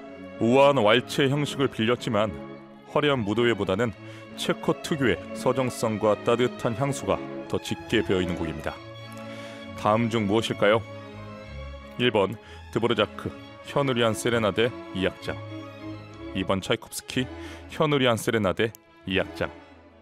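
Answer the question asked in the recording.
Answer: 1: 드보르자크 현우리안 세레나데 2악장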